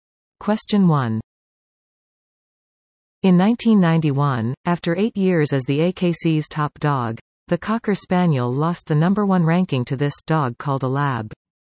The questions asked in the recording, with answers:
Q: In 1991, after eight years as the AKC's top dog, the Cocker Spaniel lost the number one ranking to this dog called a lab.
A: The answer is a Labrador retriever.